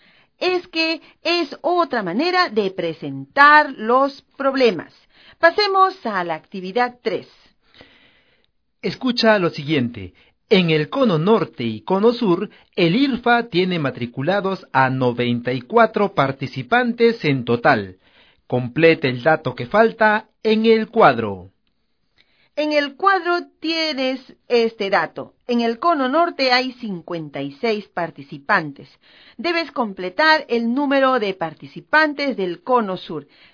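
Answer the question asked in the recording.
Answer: 38 participantes en el cono sur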